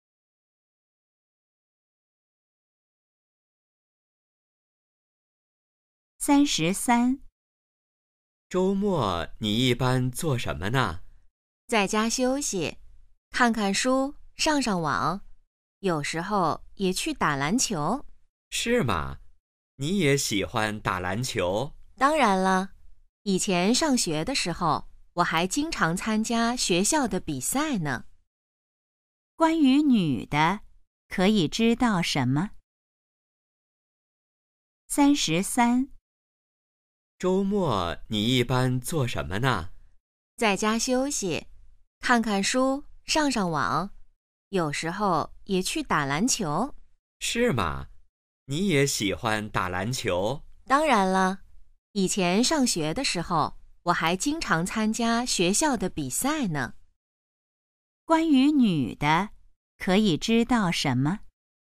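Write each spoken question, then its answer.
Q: 关于女的,可以知道什么?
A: 她喜欢打篮球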